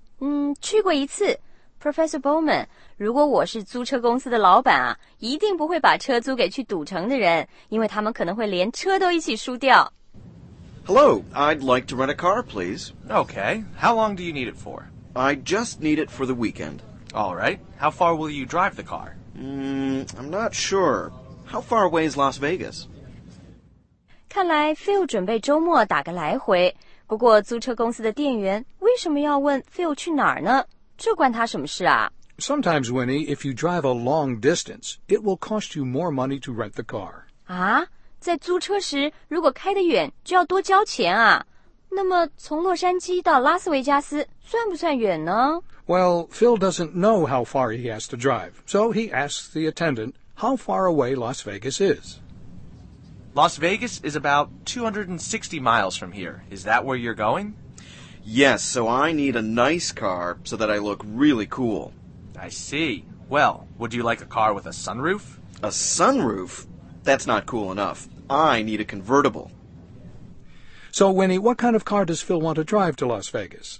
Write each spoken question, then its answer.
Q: So, Winnie, what kind of car does Phil want to drive to Las Vegas?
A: 他想开一辆酷酷的车,去拉斯维加斯这种花花世界啊,当然得开辆好车咯。